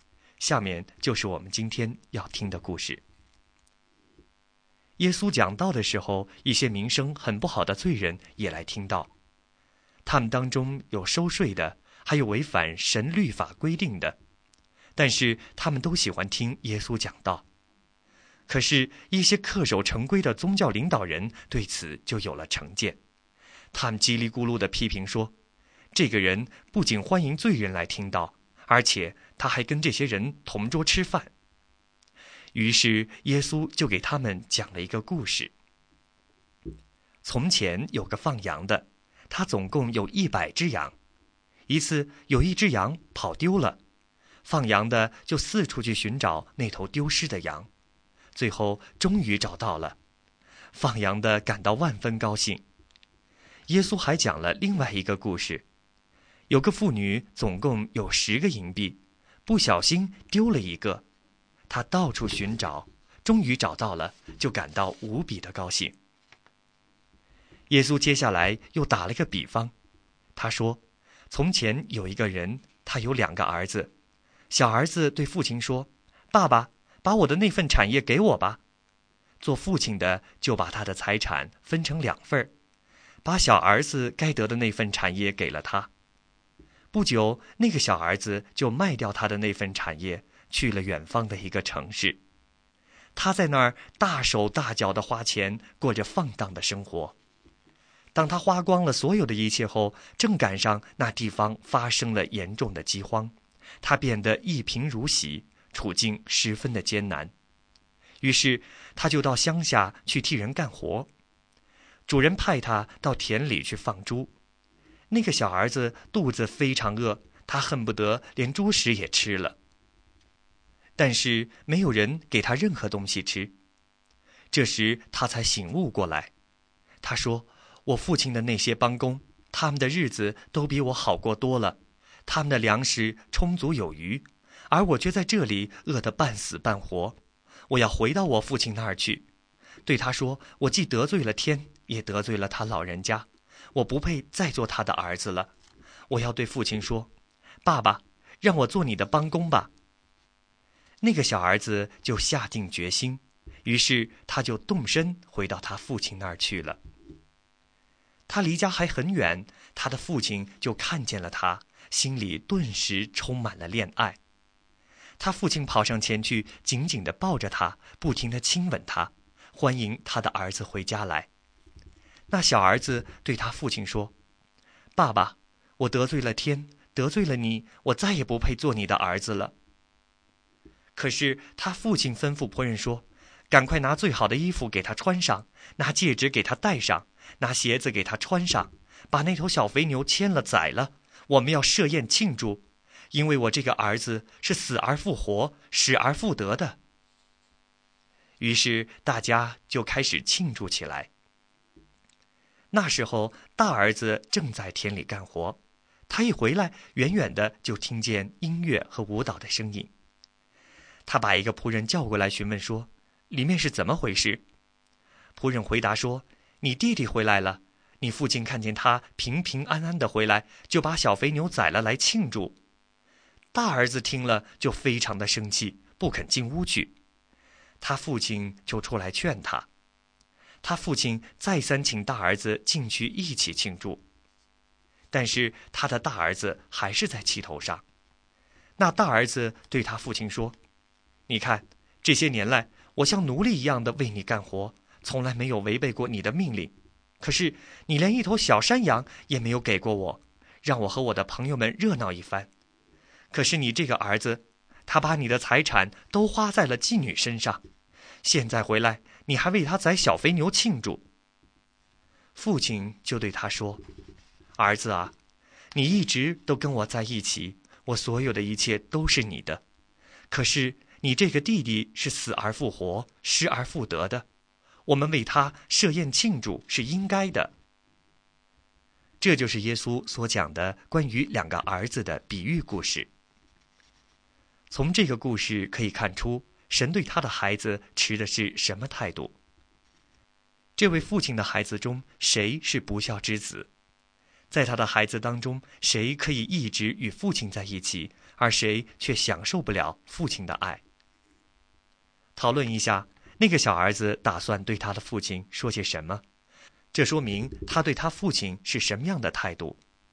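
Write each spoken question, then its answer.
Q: 讨论一下,那个小儿子打算对他的父亲说些什么?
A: 我得罪了天,也得罪了你,不配再做你的儿子,让我做你的帮工吧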